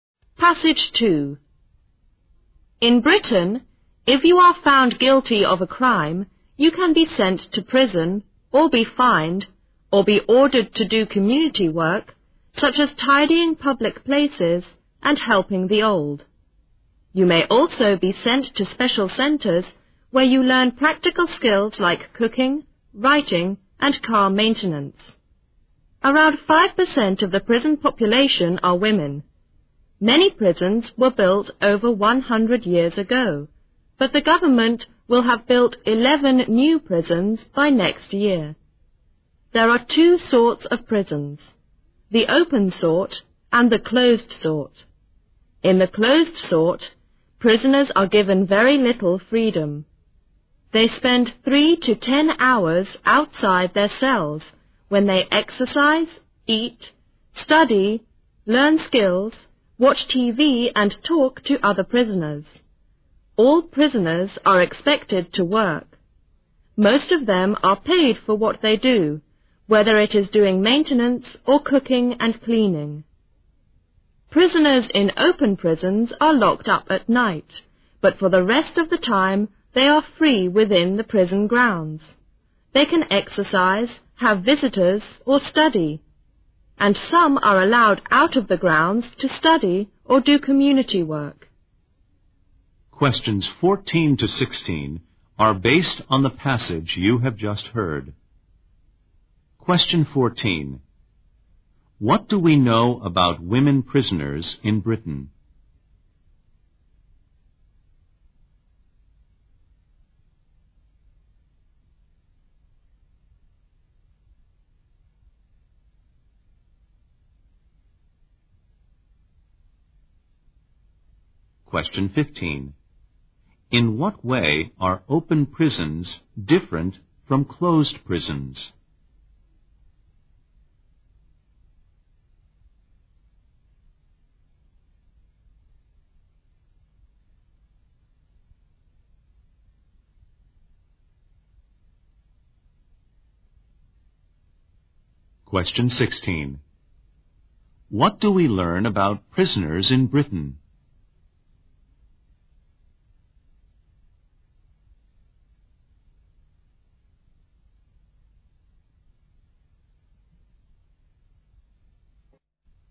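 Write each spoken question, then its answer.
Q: What do we know about women prisoners in Britain?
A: They are about 5% of the prison population.

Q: In what way are open prisons different from closed prisons?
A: Prisoners in open prisons have more freedom; they are only locked up at night and are free within the prison grounds the rest of the time.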